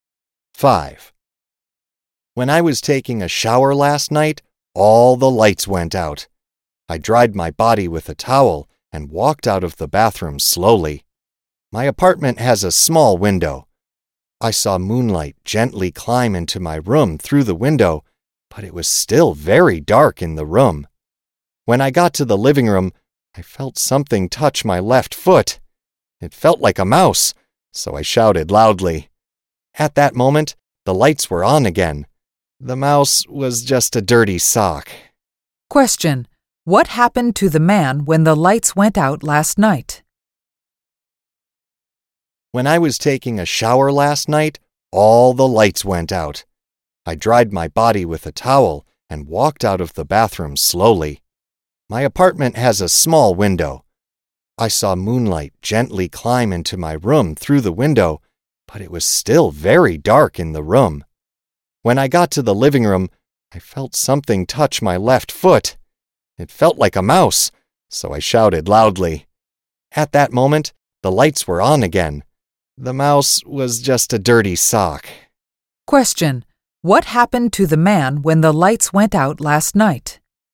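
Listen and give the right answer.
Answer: He felt a dirty sock touch his foot, thought it was a mouse, and shouted loudly.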